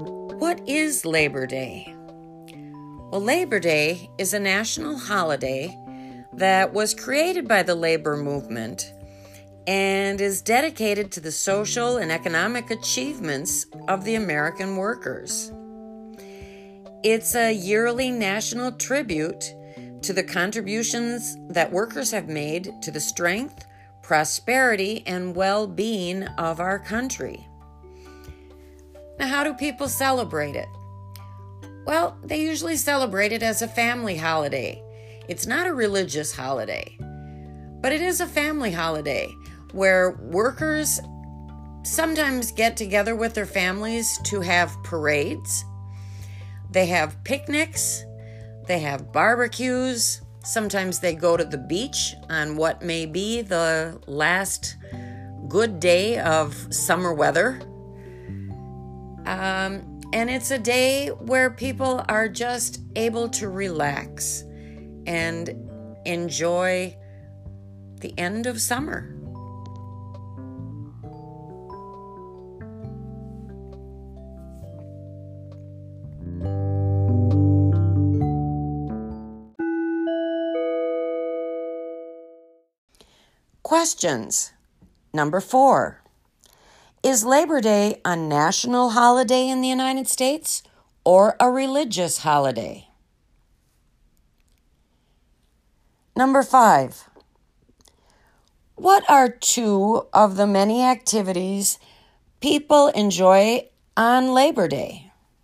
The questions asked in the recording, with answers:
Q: Is Labor Day a national holiday in the United States or a religious holiday?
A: Number four, Labor Day is a national holiday, not a religious holiday.

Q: what are two of the many activities people enjoy on Labor Day?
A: Number five, possible answers to what activities people indulge in on Labor Day include parades, picnics, barbecues, the beach, relaxing with the family.